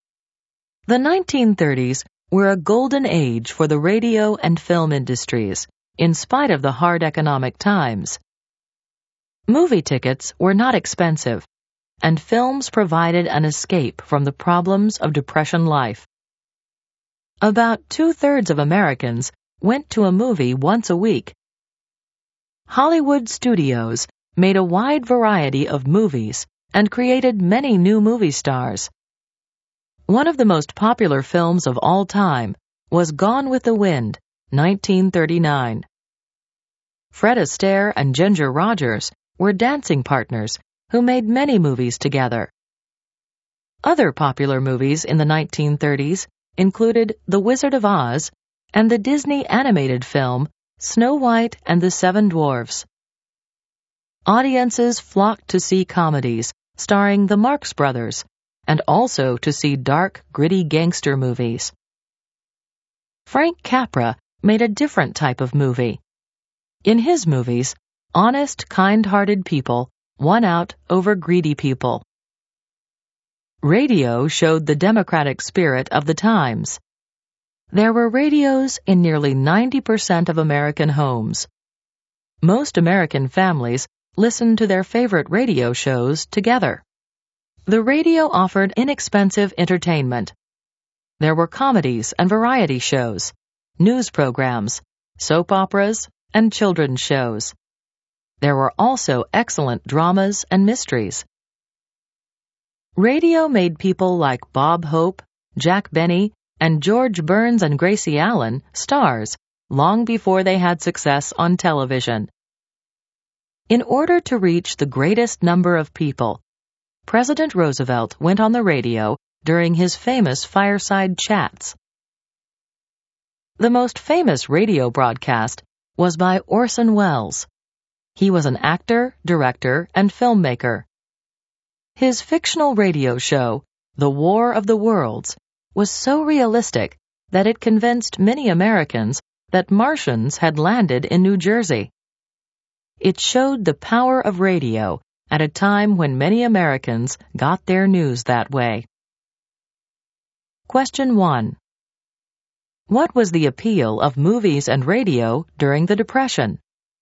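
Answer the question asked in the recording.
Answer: They were inexpensive entertainment that offered an escape from the problems of Depression life.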